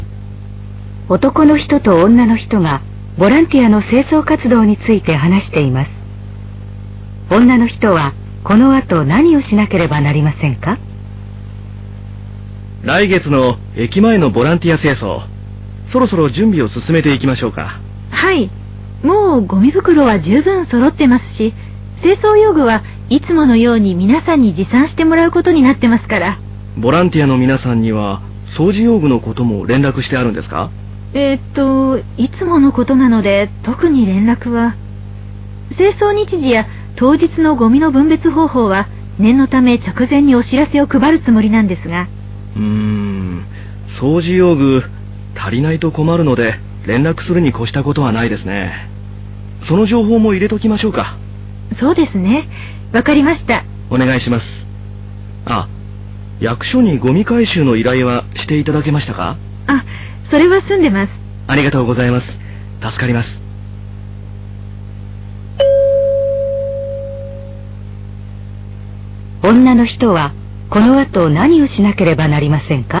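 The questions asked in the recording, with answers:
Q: 女の人はこの後何をしなければなりませんか?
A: ボランティアへのお知らせに、掃除用具を持参することを書き加える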